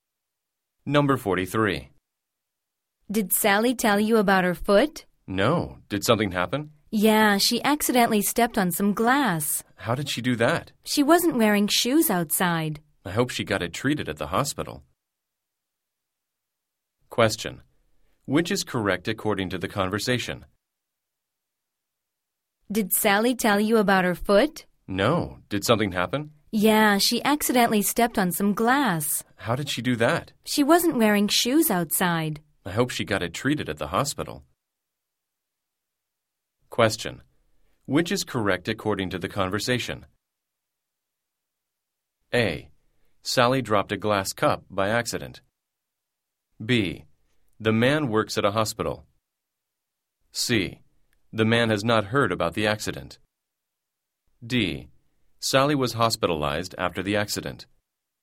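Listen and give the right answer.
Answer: C: The man has not heard about the accident.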